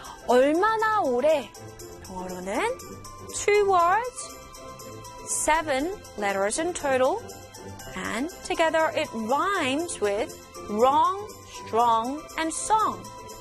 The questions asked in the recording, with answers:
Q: 얼마나 오래? 영어로는 2 words, 7 letters in total, and together it rhymes with wrong, strong, and song.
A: In English, begins with H and it is how long?